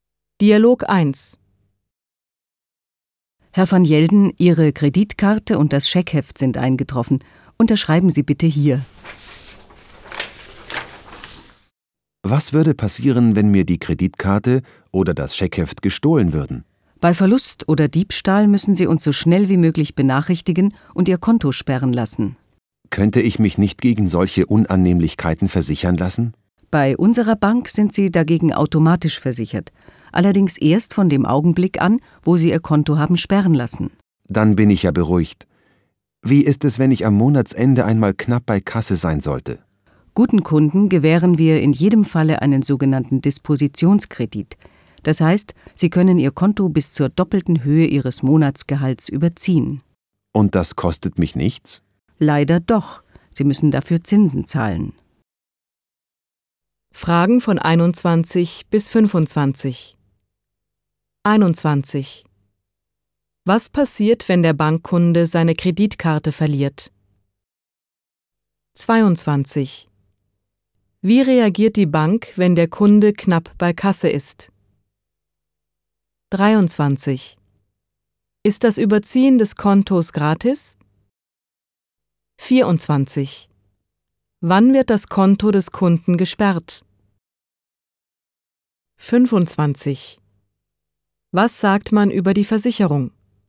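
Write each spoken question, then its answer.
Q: Was passiert, wenn der Bankkunde seine Kreditkarte verliert?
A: Er muss die Bank so schnell wie möglich benachrichtigen und das Konto sperren lassen.

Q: Wie reagiert die Bank, wenn der Kunde knapp bei Kasse ist?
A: Sie gewährt einen Dispositionskredit bis zur doppelten Höhe des Monatsgehalts.

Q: Ist das Überziehen des Kontos gratis?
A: Nein, man muss Zinsen zahlen.

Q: Wann wird das Konto des Kunden gesperrt?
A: Bei Verlust oder Diebstahl, wenn der Kunde es sperren lässt.

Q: Was sagt man über die Versicherung?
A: Man ist automatisch versichert, aber erst ab der Kontosperrung.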